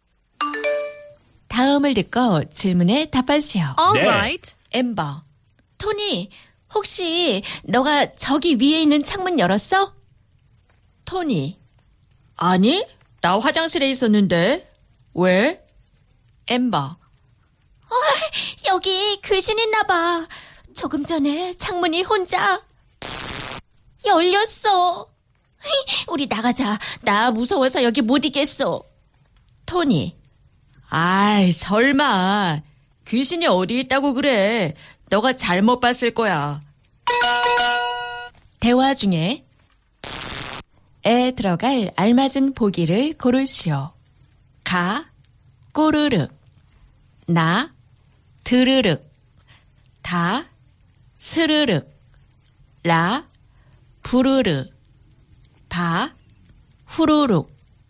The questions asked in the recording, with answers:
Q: 대화 중에 에 들어갈 알맞은 보기를 고르시오.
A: Ta. Siriruk, expressing a sound of a window or sliding door opening slowly.